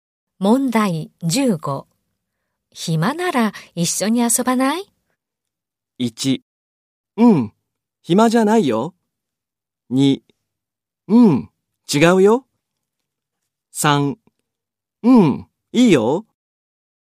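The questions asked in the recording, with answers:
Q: 暇なら一緒に遊ばない?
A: 1: うん、いいよ。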